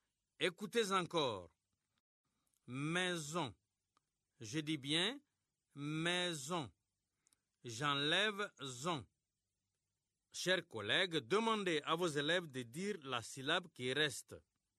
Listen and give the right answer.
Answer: Il reste mais.